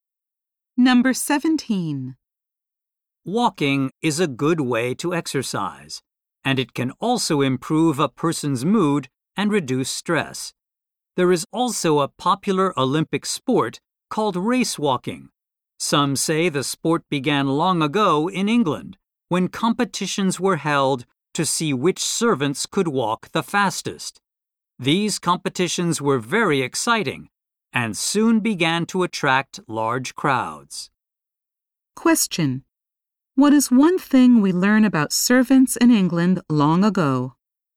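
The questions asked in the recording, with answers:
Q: What is one thing we learn about servants in England long ago?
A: They competed to see who could walk the fastest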